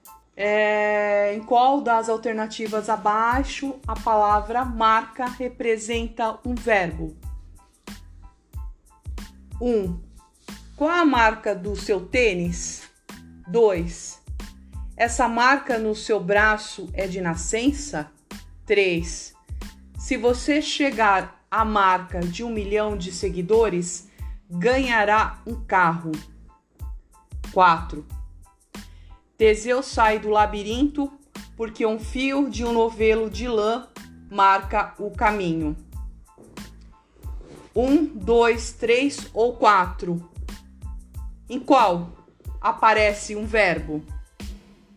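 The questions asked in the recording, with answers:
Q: É, em qual das alternativas abaixo a palavra marca representa um verbo?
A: 4: Teseu sai do labirinto porque um fio de um novelo de lã marca o caminho.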